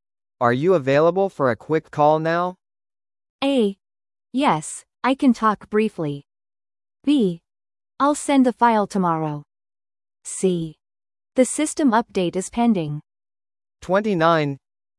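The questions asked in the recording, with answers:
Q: Are you available for a quick call now?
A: A: Yes, I can talk briefly.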